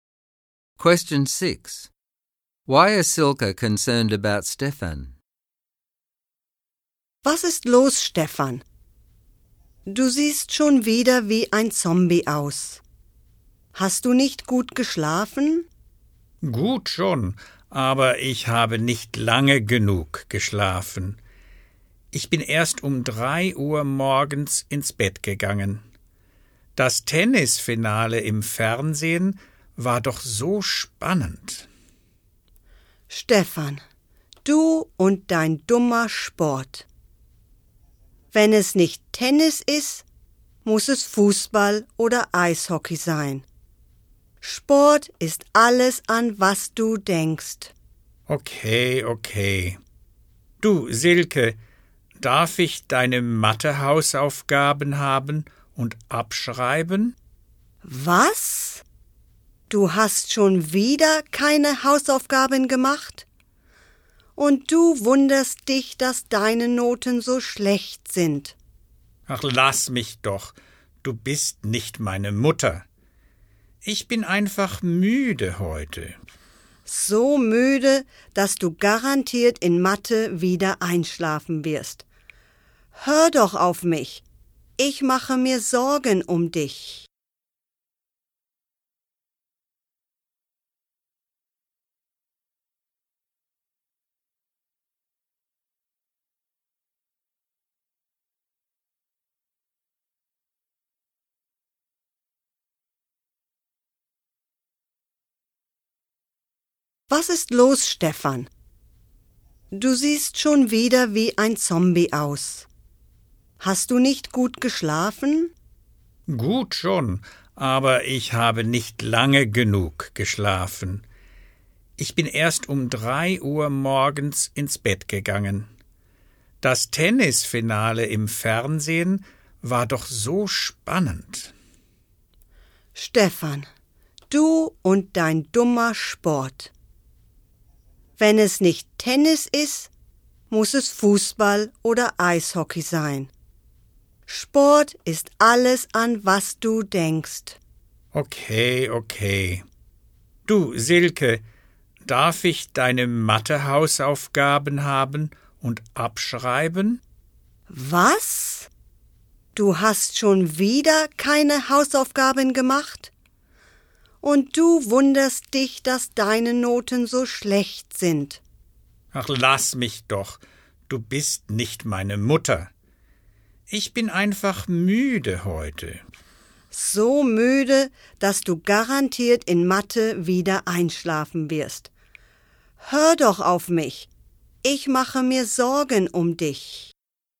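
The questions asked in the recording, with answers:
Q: Why is Silke concerned about Stefan?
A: He stays up late watching sport, is always tired, doesn't do his homework, copies hers, has bad grades and will fall asleep in maths.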